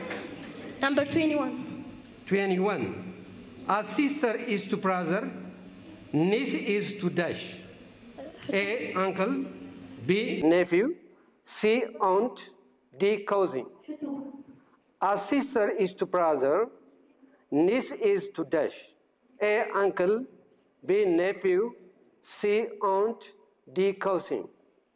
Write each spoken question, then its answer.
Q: A sister is to brother, niece is to dash.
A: Nephew.